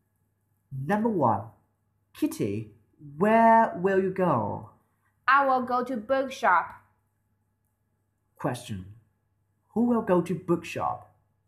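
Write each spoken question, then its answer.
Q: Who will go to bookshop?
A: Kitty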